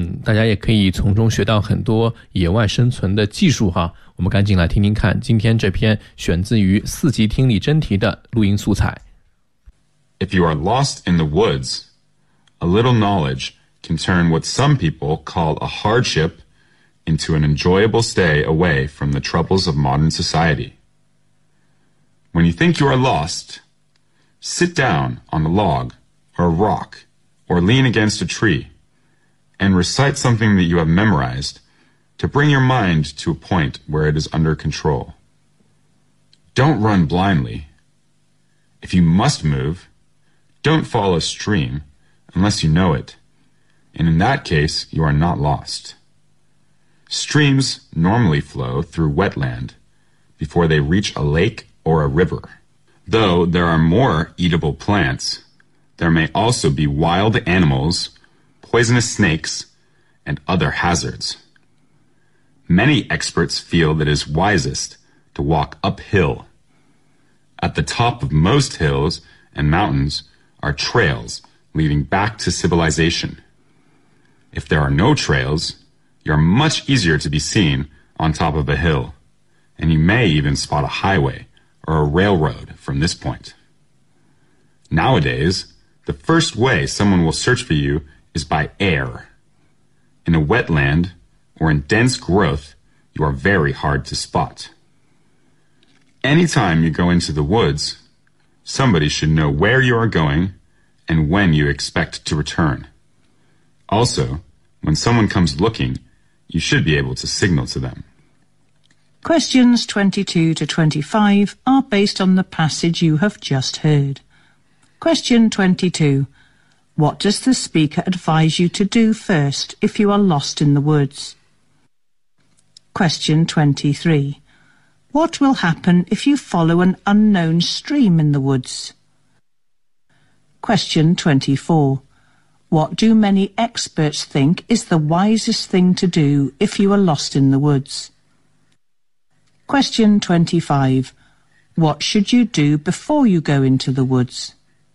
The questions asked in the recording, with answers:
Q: What does the speaker advise you to do first if you are lost in the woods?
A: You should calm downand try to bring your mind under control.

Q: What will happen if you follow an unknown stream in the woods?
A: You may come across wild animals, even poisonous snakes and other hazards.

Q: What do many experts think is the wisest thing to do if you are lost in the woods?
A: To walk uphill

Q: What should you do before you go into the woods?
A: You should tell somebody else where you are going and when you are expected to return.